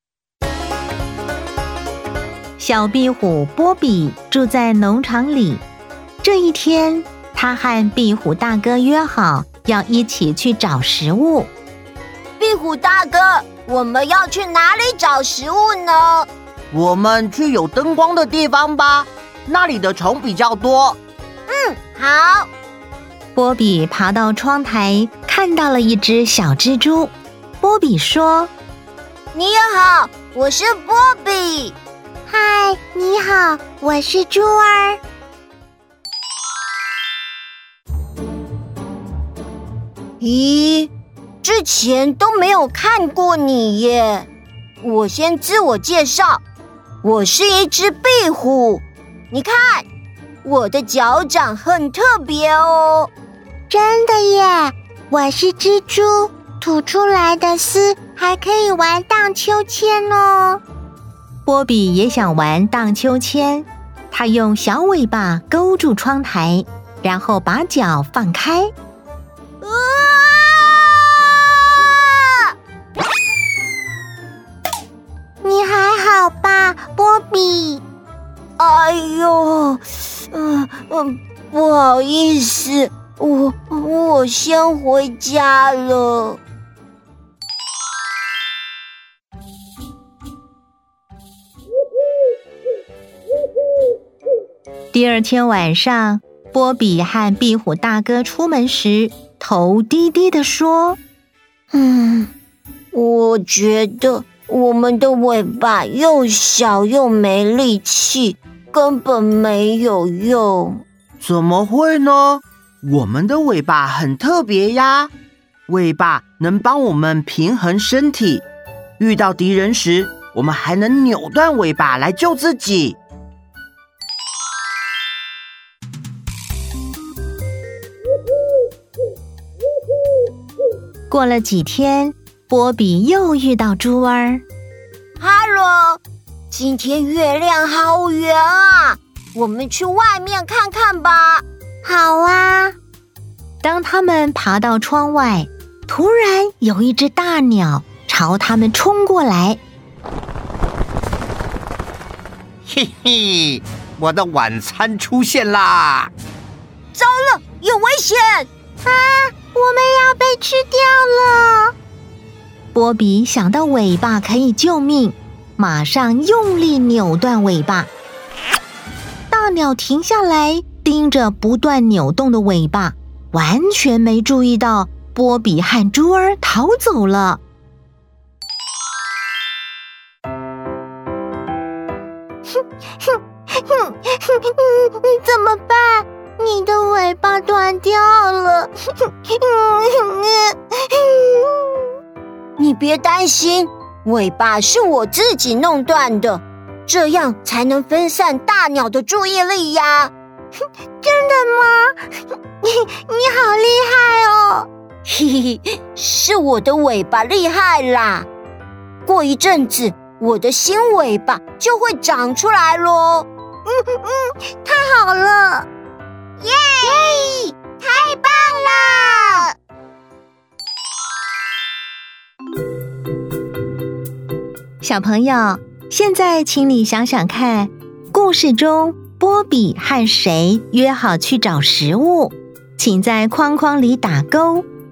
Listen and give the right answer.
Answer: 壁虎大哥,